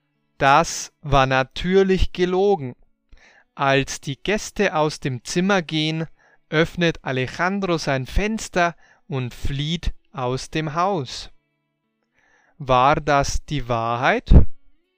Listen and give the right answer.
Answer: Nein, das war nicht die Wahrheit.